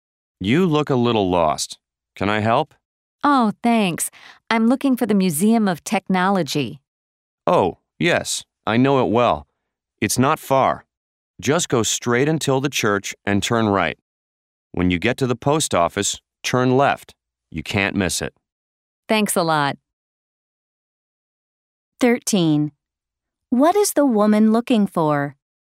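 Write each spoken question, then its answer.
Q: What is the woman looking for?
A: The Museum of Technology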